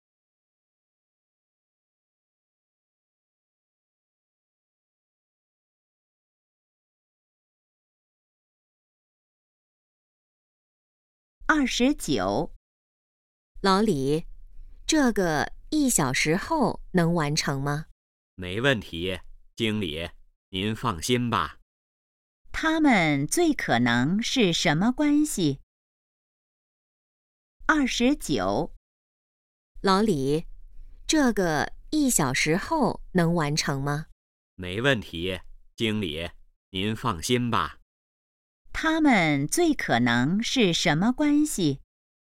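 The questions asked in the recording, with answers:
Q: 他们最可能是什么关系?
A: 同事(经理和职员)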